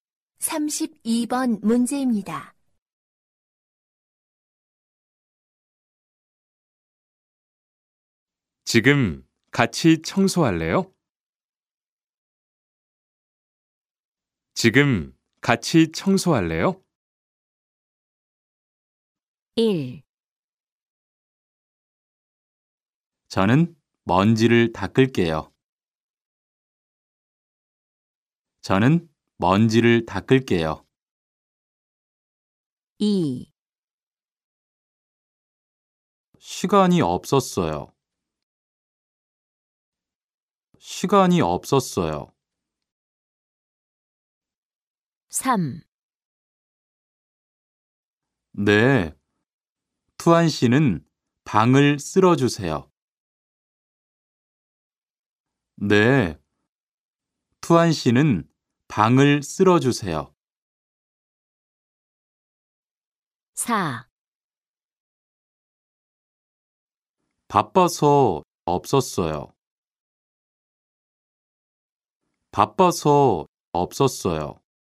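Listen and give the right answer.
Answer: 3: 네. 투안 씨는 방을 쓸어 주세요.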